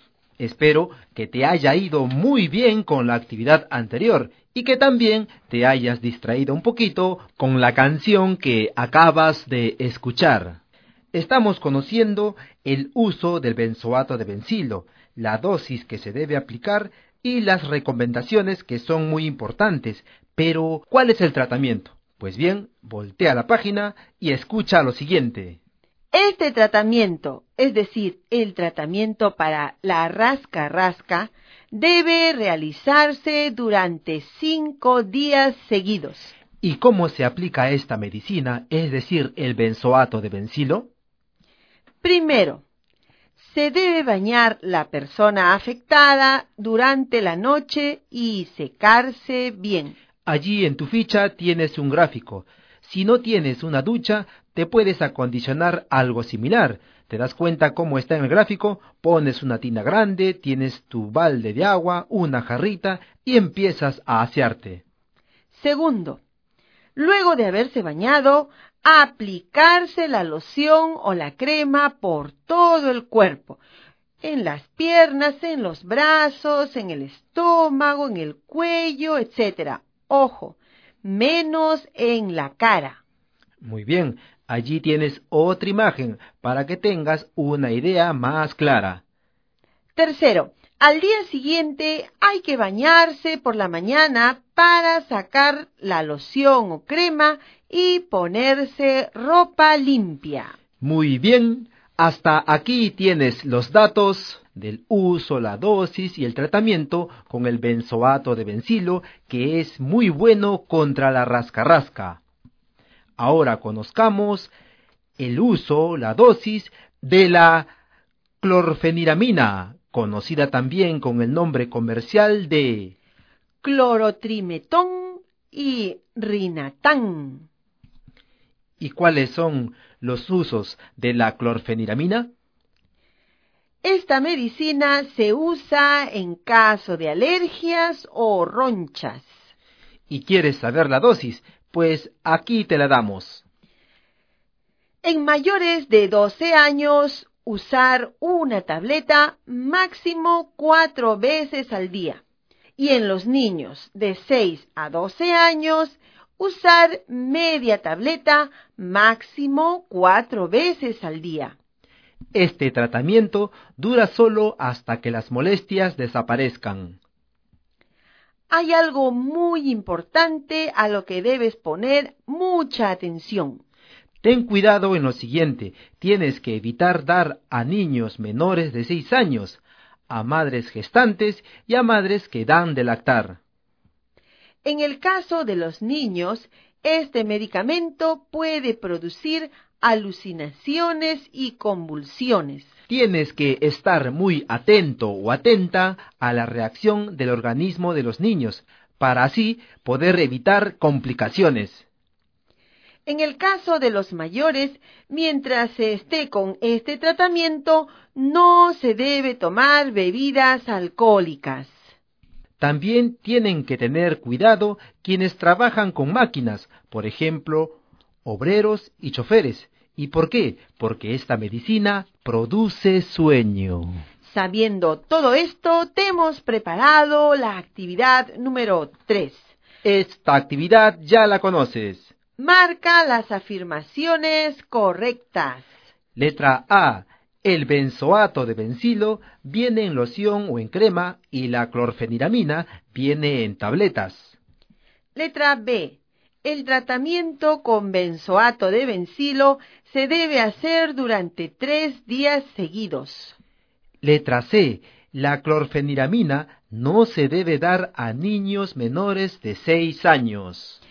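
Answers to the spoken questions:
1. Correcta
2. Incorrecta (son 5 días seguidos)
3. Correcta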